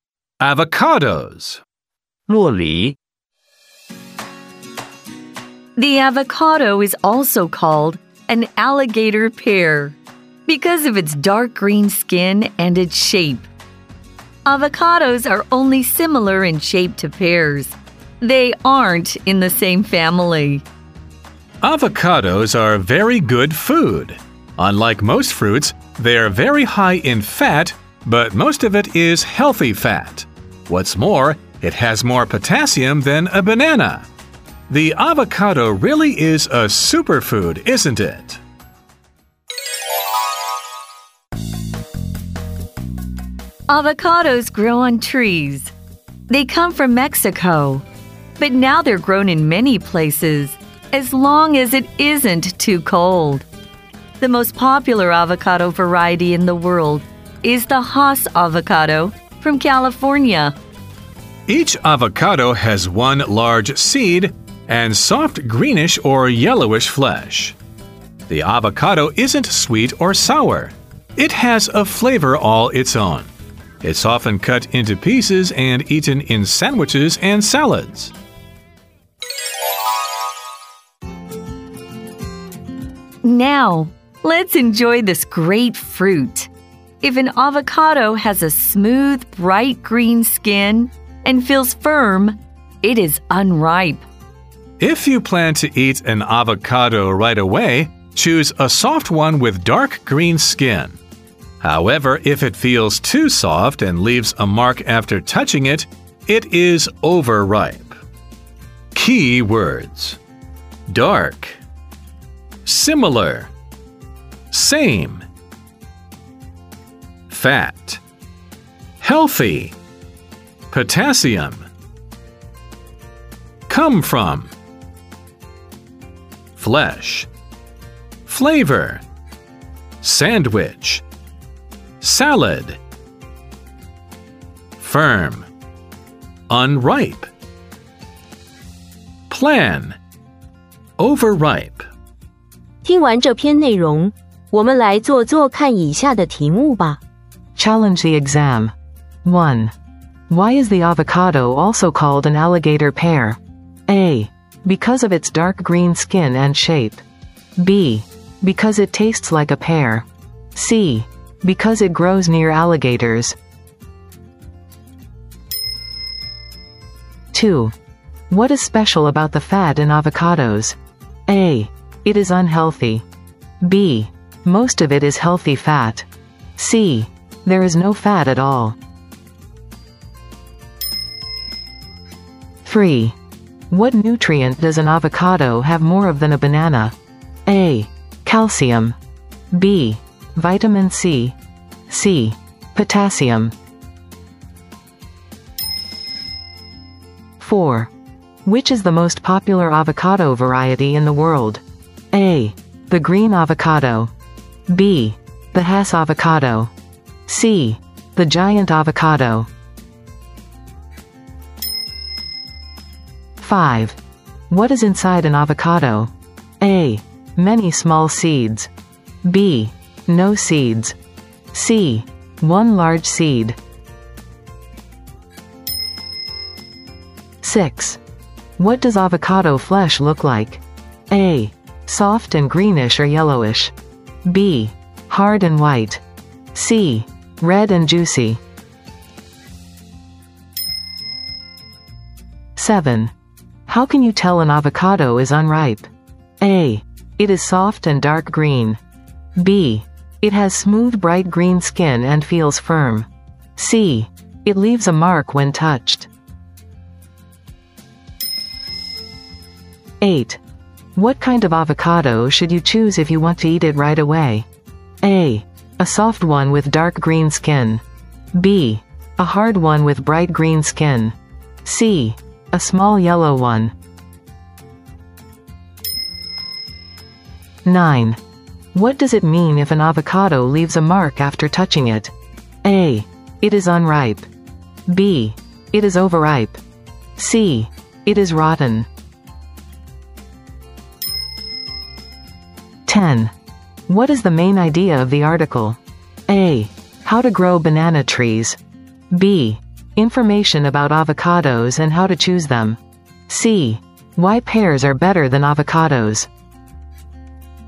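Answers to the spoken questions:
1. A: Because of its dark green skin and shape.
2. B: Most of it is healthy fat.
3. C: Potassium.
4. B: The Haas avocado.
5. C: One large seed.
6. A: Soft and greenish or yellowish.
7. B: It has smooth, bright green skin and feels firm.
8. A: A soft one with dark green skin.
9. B: It is overripe.
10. B: Information about avocados and how to choose them.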